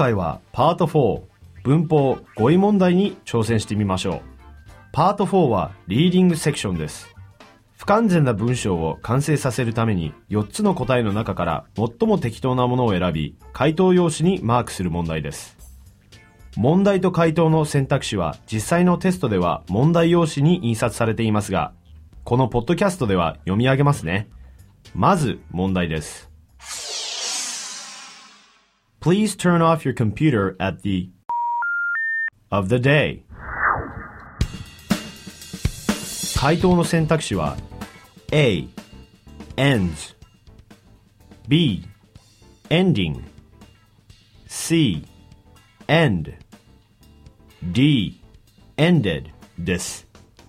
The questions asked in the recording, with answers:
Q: Please turn off your computer at the of the day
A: 正解は C の end です